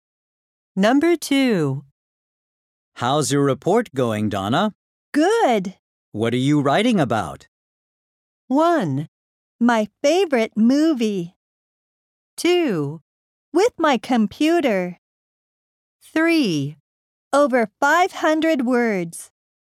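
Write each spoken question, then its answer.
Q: What are you writing about?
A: 1: My favorite movie.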